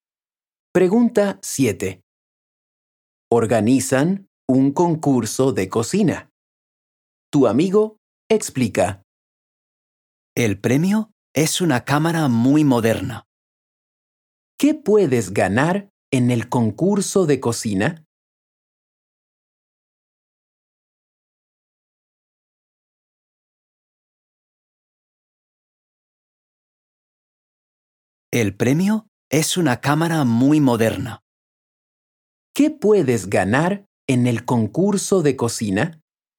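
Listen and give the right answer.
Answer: Una cámara muy moderna.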